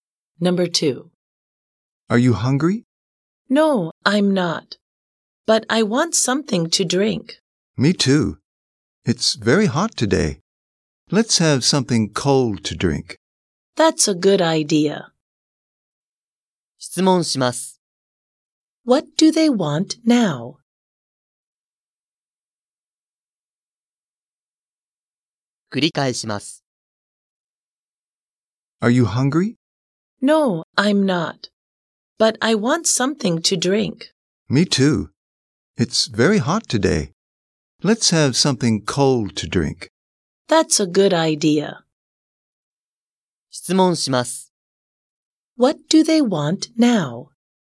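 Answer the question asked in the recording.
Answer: Something cold to drink.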